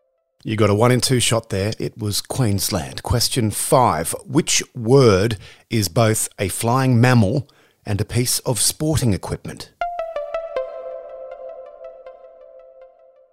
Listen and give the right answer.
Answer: A bat.